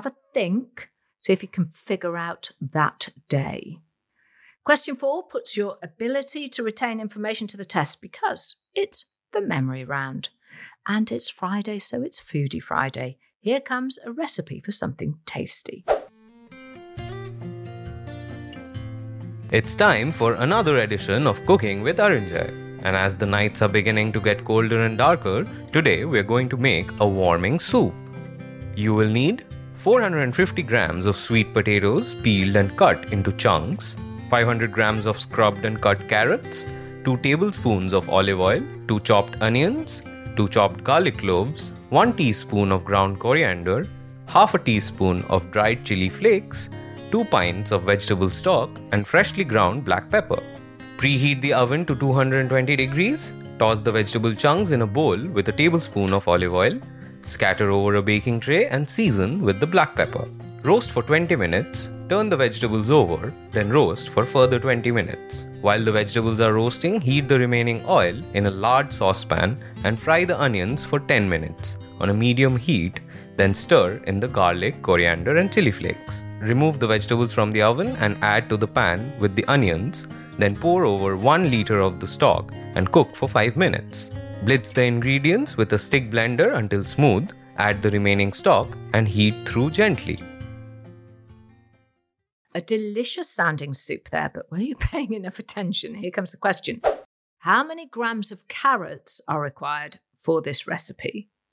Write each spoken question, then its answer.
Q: How many grams of carrots are required for this recipe?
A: And the answer is 500 grams.